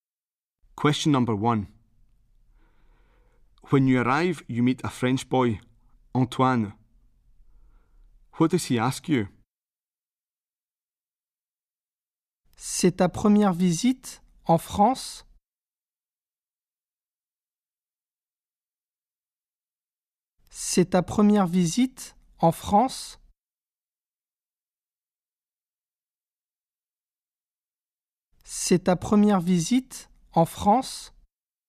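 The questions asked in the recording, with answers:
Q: What does he ask you?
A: Whether it is your first visit to France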